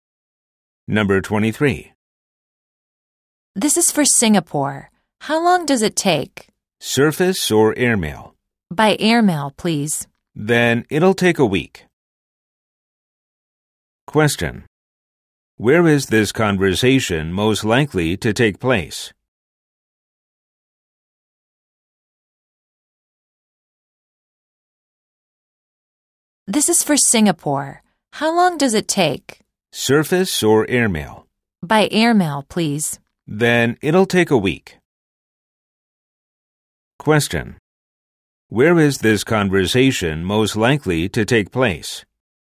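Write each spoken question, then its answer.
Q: Where is this conversation most likely to take place?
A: At a post office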